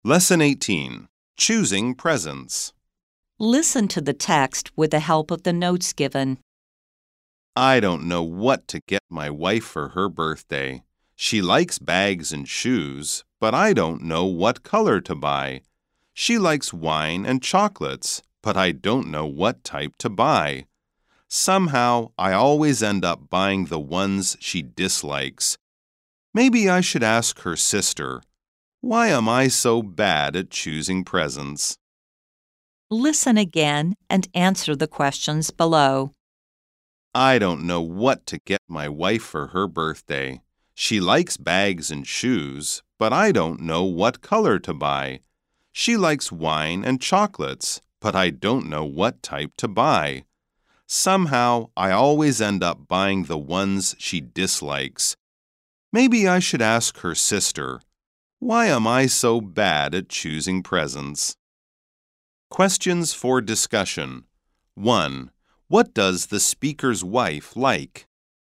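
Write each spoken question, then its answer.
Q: What does the speaker's wife like?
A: Bags, shoes, wine and chocolates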